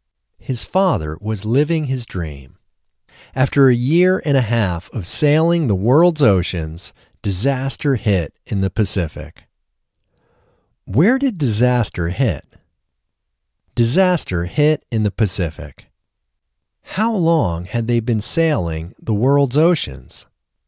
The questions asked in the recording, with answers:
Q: How long had they been sailing the world's oceans?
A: They had been sailing the world's oceans for a year and a half.